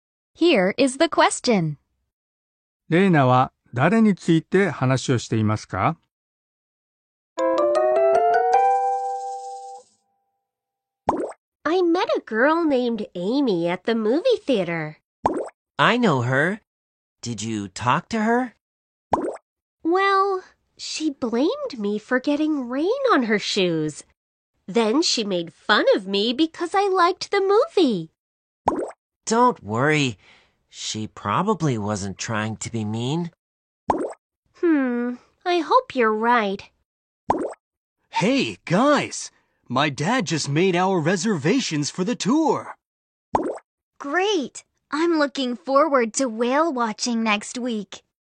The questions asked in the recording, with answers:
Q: レーナは誰について話をしていますか?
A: 答えは、エイミーですね。